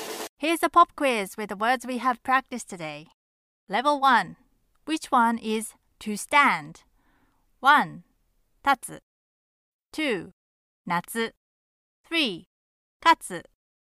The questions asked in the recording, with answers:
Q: Which one is to stand?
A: Number one, tatsu is the answer.